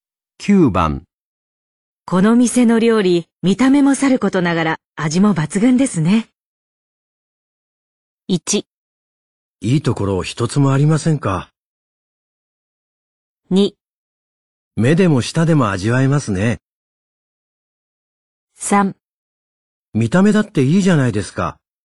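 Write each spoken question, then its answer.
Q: この店の料理、見た目もさることながら味も抜群ですね。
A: 2: 目でも舌でも味わえますね。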